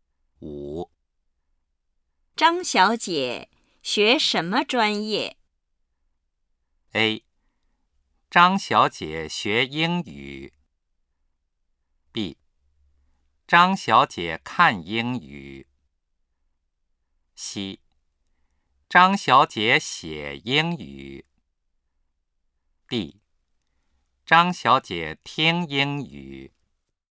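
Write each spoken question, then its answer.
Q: 张小姐学什么专业?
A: A: 张小姐学英语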